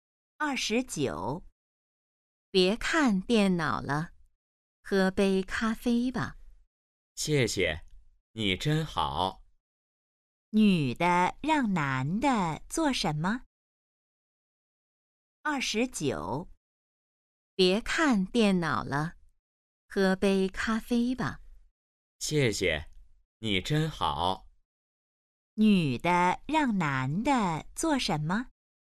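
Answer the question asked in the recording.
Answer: 喝杯咖啡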